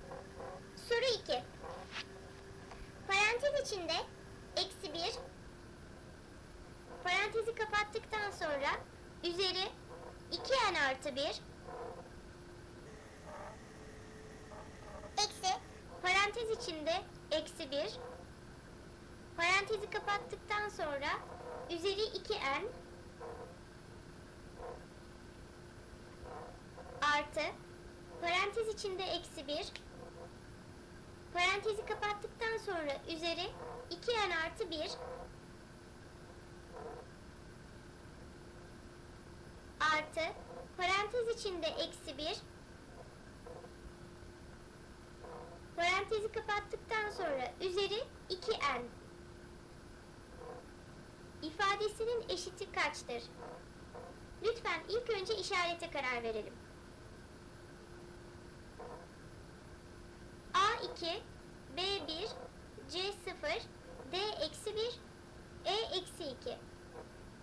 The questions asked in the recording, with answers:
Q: İfadesinin eşiti kaçtır?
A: Doğru cevap E-2.